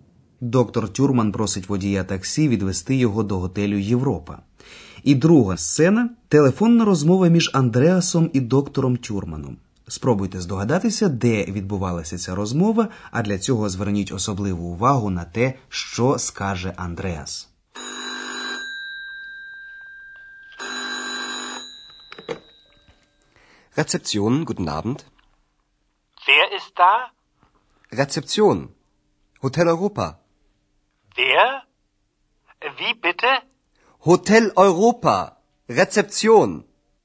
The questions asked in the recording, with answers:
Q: Спробуйте здогадатися, де відбувалася ця розмова, а для цього зверніть особливу увагу на те, що скаже Андреас.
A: Сподіваємося, вам не важко було здогадатися, що доктор Тюрман дзвонив до рецепціон, бюро реєстрації вже знайомого вам готелю Європа